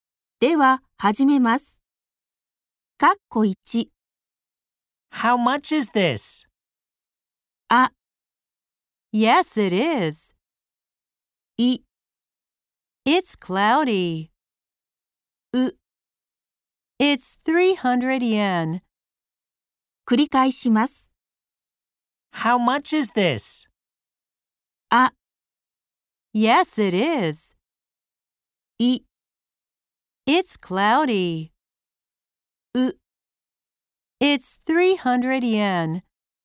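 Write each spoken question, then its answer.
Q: How much is this?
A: う: It's 300 yen.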